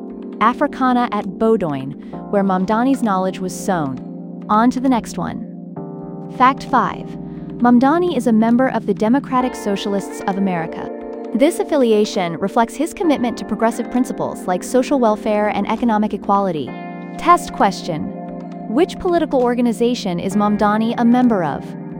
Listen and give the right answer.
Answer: Correct answer. Democratic Socialists of America.